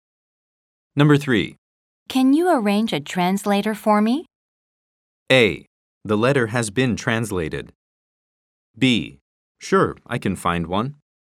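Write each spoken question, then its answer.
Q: Can you arrange a translator for me?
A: B: Sure, I can find one.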